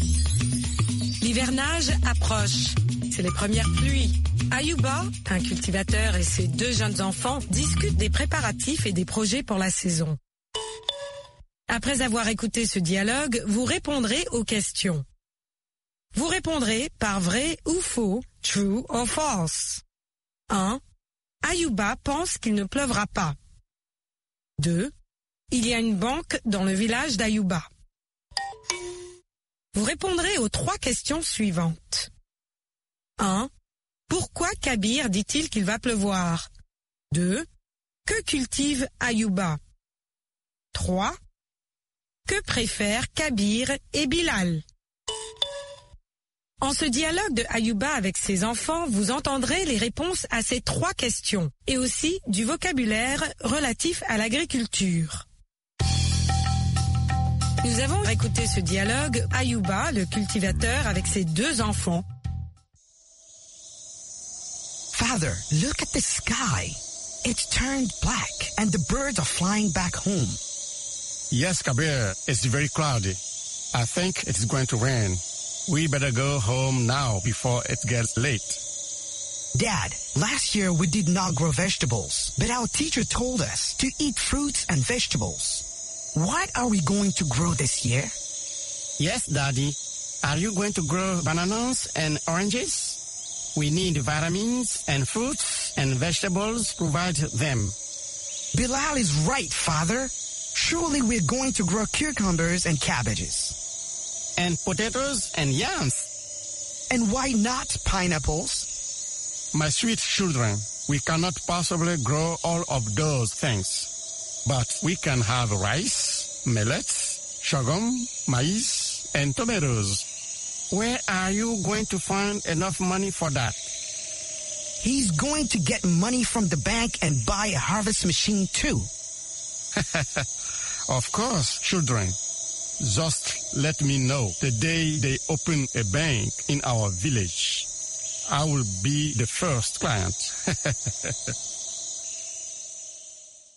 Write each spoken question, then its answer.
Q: Ayuba pense qu'il ne pleuvra pas.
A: L'énoncé 1 est faux.

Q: Il y a une banque dans le village d'Ayuba.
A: L'énoncé 2 est faux.

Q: Pourquoi Kabir dit-il qu'il va pleuvoir?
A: Parce que le ciel est nuageux.

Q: Que cultive Ayuba?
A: Ayuba cultive du riz, du mil, du sorgho, du maïs et de la tomate.

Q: Que préfèrent Kabir et Bilal?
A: Ils préfèrent les légumes et des fruits.